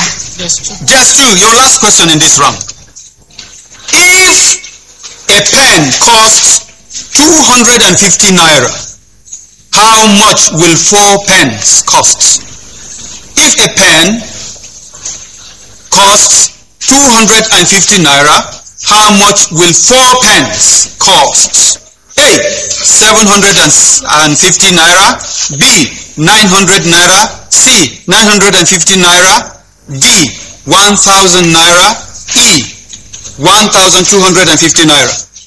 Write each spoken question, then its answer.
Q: If a pen costs 250 naira, how much will four pens cost?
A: 1,000 naira.